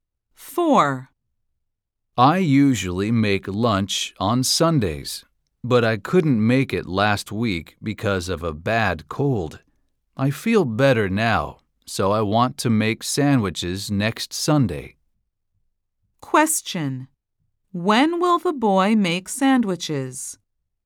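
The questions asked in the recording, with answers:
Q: When will the boy make sandwiches?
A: Next Sunday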